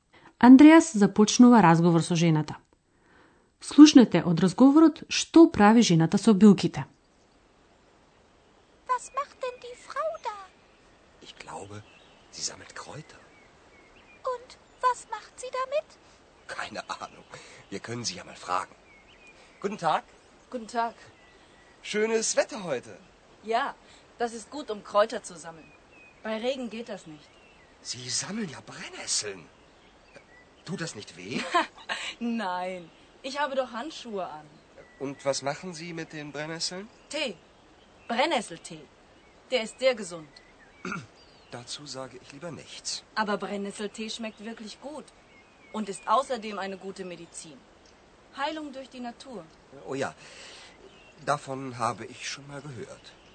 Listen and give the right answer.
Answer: Андреас дознава дека жената од копривите прави чај,